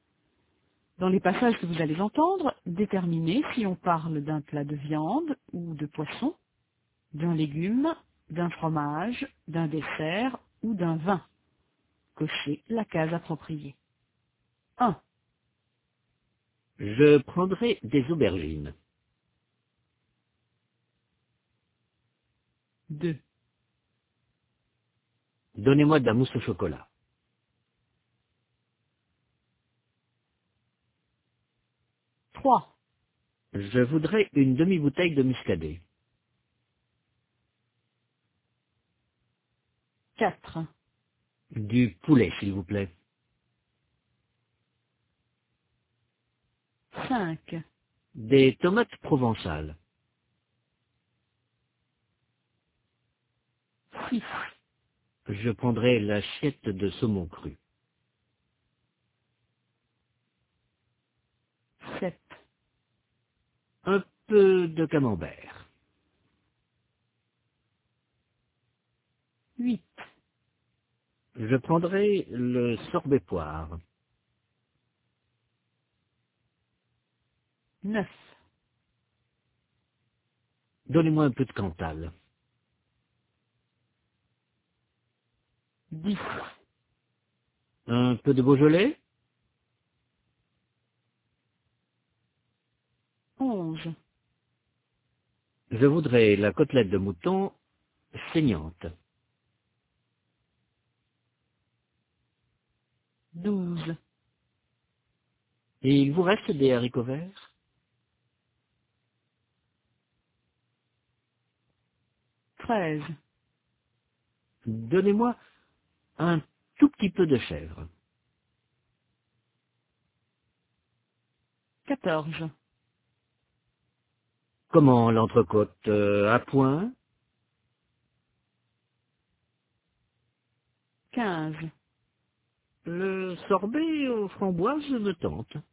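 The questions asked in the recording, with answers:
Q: Je prendrai des aubergines.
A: un légume

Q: Donnez-moi de la mousse au chocolat.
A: un dessert

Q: Je voudrais une demi-bouteille de muscadet.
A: un vin

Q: Du poulet, s'il vous plaît.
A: un plat de viande ou de poisson

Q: Des tomates provençales.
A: un légume

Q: Je prendrai l'assiette de saumon cru.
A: un plat de viande ou de poisson

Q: Un peu de camembert.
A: un fromage

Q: Je prendrai le sorbet poire.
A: un dessert

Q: Donnez-moi un peu de cantal.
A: un fromage

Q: Un peu de Beaujolais.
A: un vin

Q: Je voudrais la côtelette de mouton saignante.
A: un plat de viande ou de poisson

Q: Et il vous reste des haricots verts?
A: un légume

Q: Donnez-moi un tout petit peu de chèvre.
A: un fromage

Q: Comment l'entrecôte, à point?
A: un plat de viande ou de poisson

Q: Le sorbet aux framboises me tente.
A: un dessert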